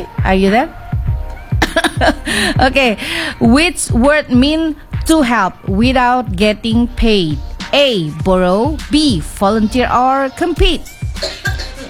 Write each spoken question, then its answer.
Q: which word mean to help without getting paid? A, borrow. B, volunteer. Or compete.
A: Okay, so it's B, volunteer.